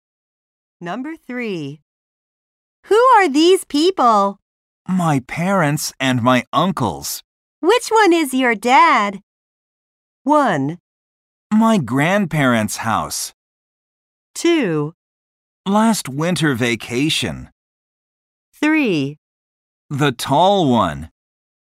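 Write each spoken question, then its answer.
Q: Which one is your dad?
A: 3: The tall one.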